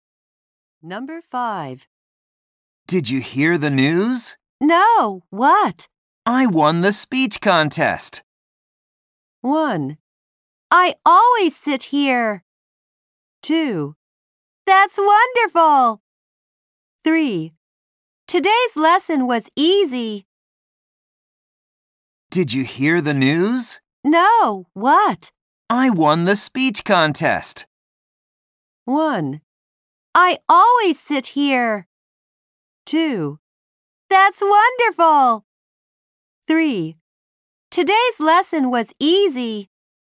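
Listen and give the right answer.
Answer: 2: That's wonderful.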